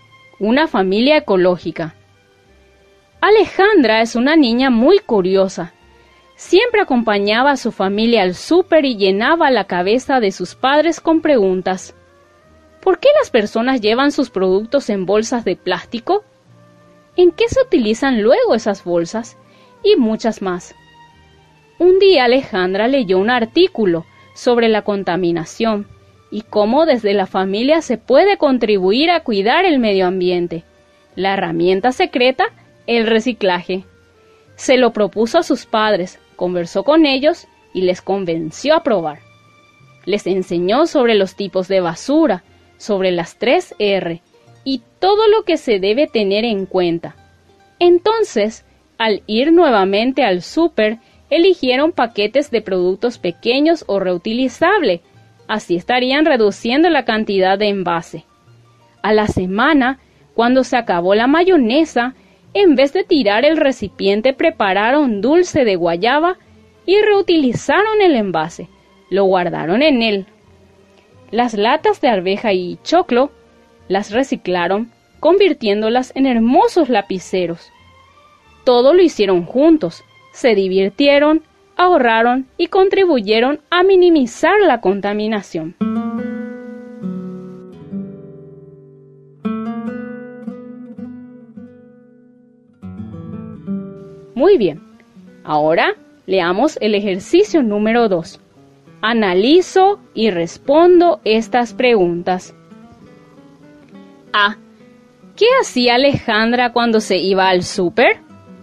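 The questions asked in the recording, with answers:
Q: ¿Qué hacía Alejandra cuando se iba al súper?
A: Acompañaba a su familia y llenaba la cabeza de sus padres con preguntas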